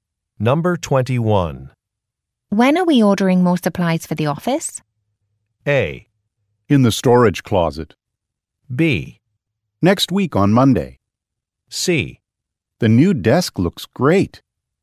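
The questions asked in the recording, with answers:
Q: When are we ordering more supplies for the office?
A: B: Next week on Monday.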